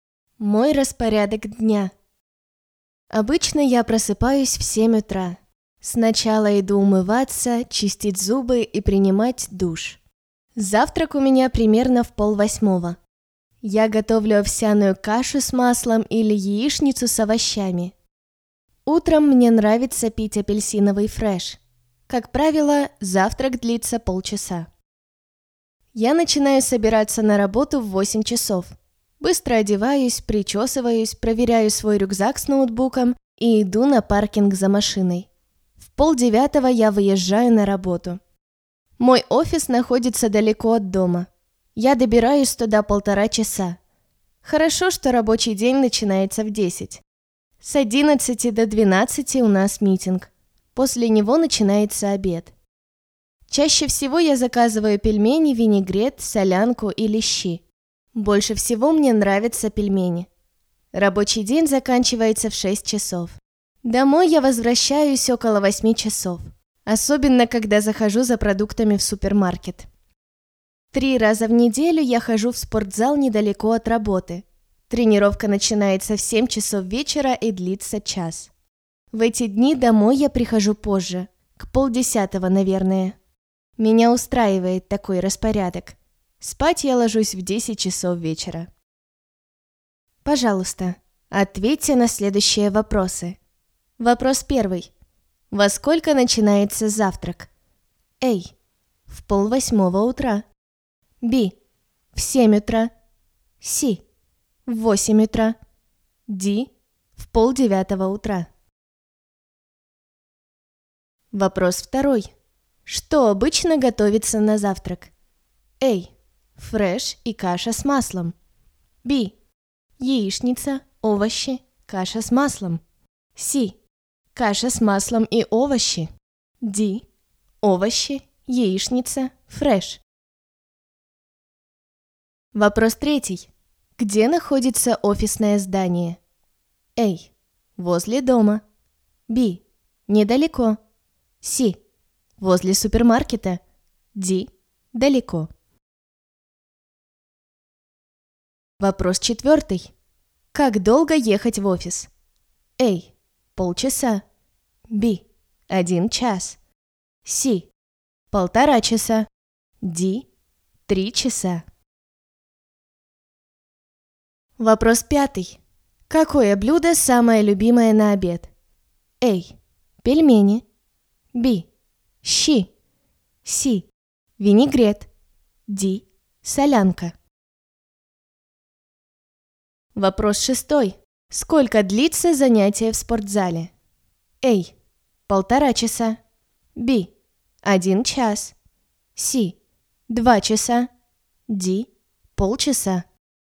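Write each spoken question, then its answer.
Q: Во сколько начинается завтрак?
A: A: В 7:30 утра.

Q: Где находится офисное здание?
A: D: Далеко.

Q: Как долго ехать в офис?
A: C: 1.5 часа.

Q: Какое блюдо самое любимое на обед?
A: A: Пельмени.

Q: Сколько длится занятие в спортзале?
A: B: 1 час.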